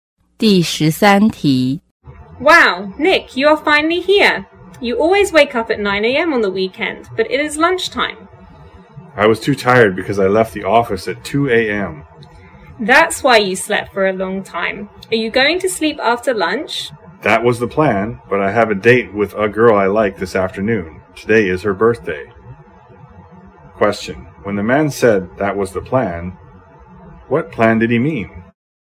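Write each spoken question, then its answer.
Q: When the man said that was the plan, what plan did he mean?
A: To sleep after lunch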